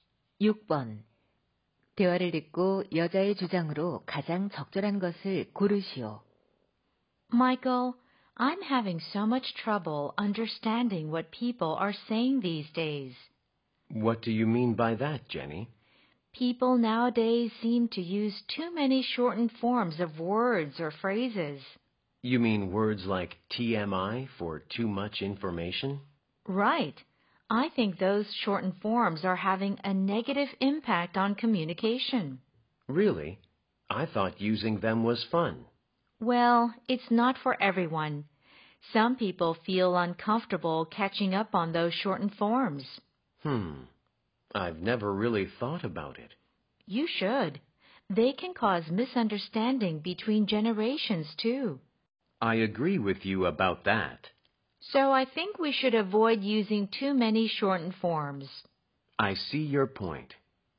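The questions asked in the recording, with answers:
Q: 대화를 듣고 여자의 주장으로 가장 적절한 것을 고르시오.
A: 줄임말을 지나치게 사용하지 말아야 한다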